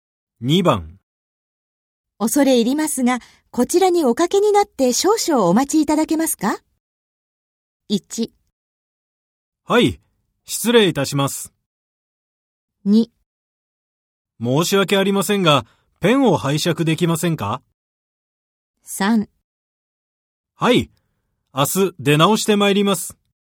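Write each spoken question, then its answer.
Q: 恐れ入りますが、こちらにおかけになって少々お待ちいただけますか?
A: 1: はい、失礼いたします。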